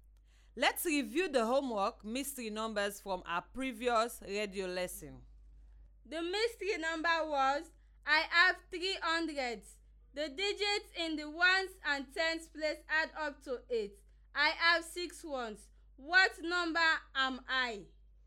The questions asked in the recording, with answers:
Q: What number am I?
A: The answer is 326.